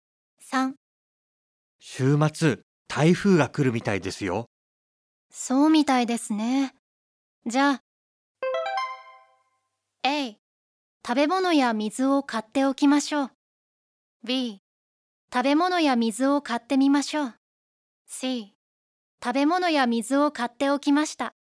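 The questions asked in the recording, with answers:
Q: そうみたいですね。じゃあ、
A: A: 食べ物や水を買っておきましょう。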